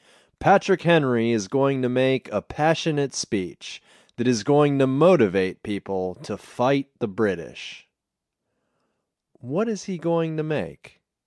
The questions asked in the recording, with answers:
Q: What is he going to make?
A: He is going to make a passionate speech.